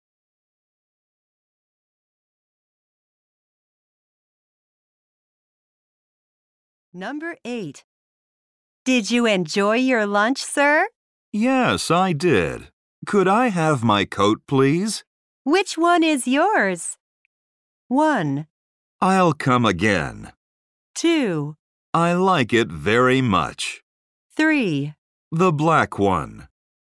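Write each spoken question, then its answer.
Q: Which one is yours?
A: 3: The black one.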